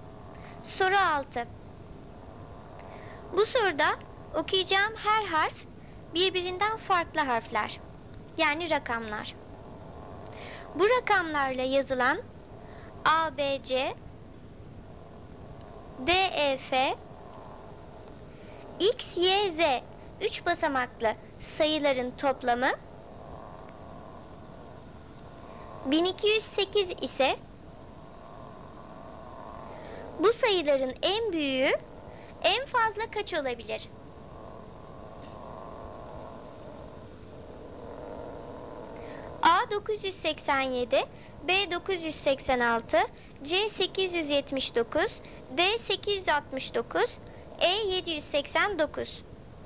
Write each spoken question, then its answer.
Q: bu sayıların en büyüğü en fazla kaç olabilir?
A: Doğru cevap D 869.